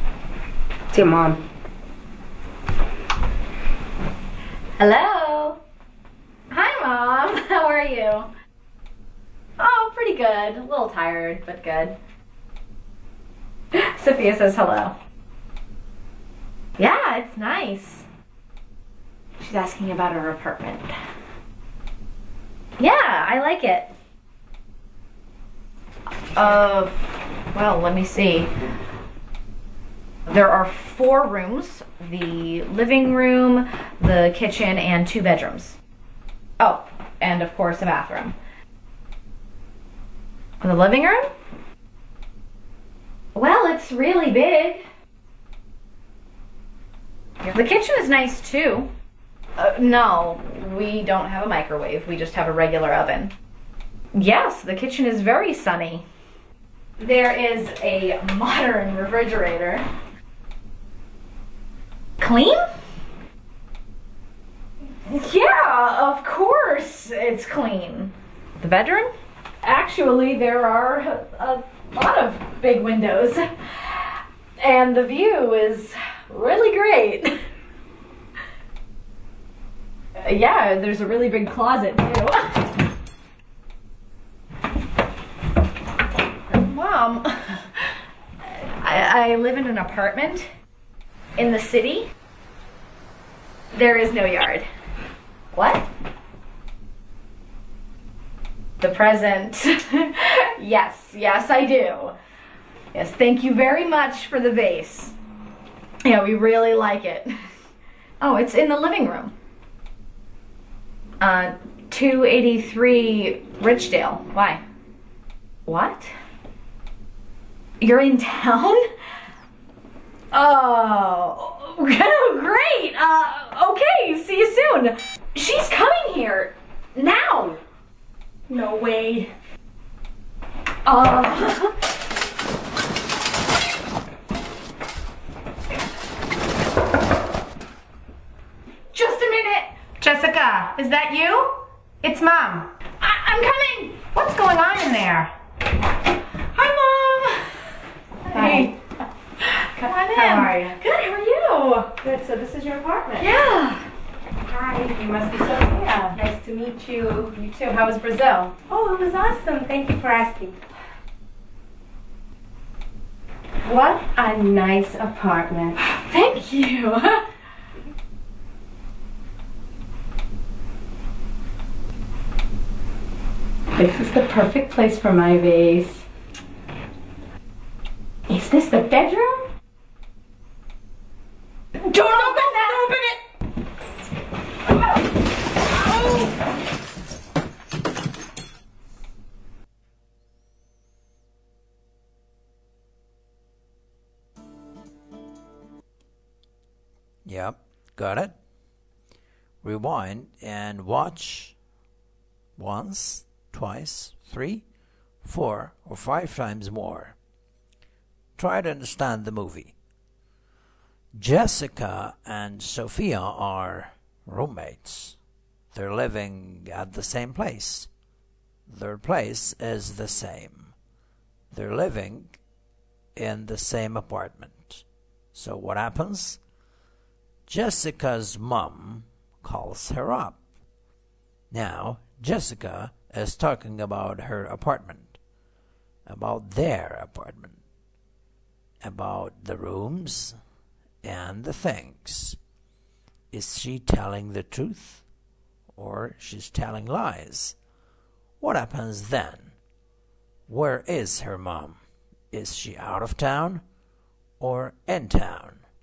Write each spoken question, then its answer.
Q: Is she out of town or in town?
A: She's in town. She's not out of town.